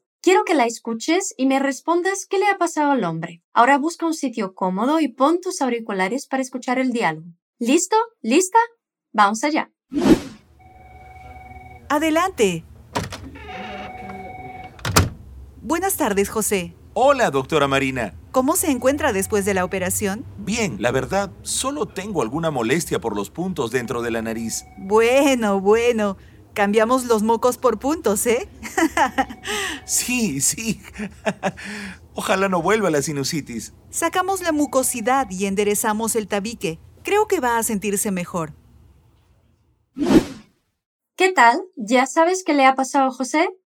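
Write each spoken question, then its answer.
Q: Quiero que la escuches y me respondas qué le ha pasado al hombre.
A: Lo han operado de la nariz por la sinusitis: le sacaron la mucosidad y le enderezaron el tabique.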